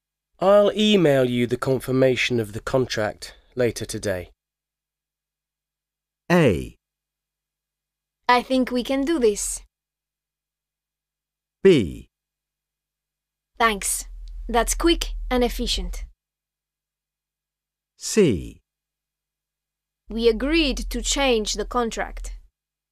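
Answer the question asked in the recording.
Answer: B: Thanks. That's quick and efficient.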